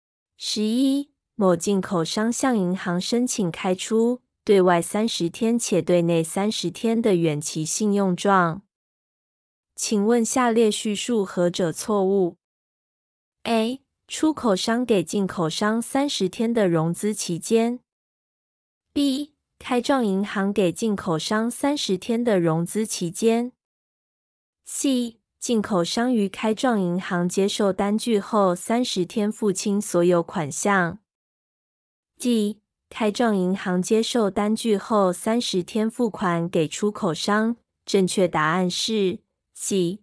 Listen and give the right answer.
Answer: 正确答案是 C.